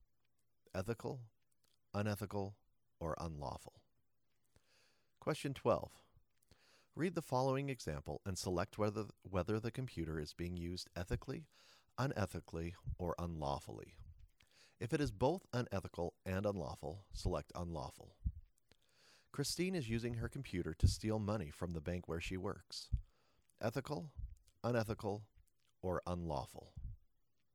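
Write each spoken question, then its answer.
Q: Ethical, unethical, or unlawful.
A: unlawful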